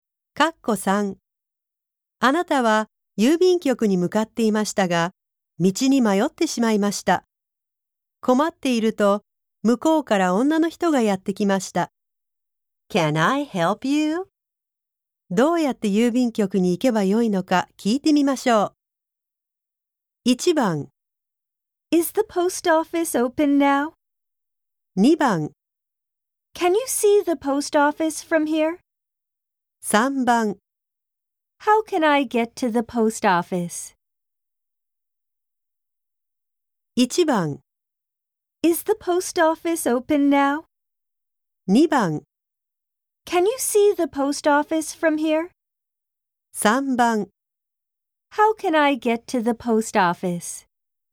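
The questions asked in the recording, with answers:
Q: どうやって郵便局に行けばよいのか聞いてみましょう。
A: 3: How can I get to the post office?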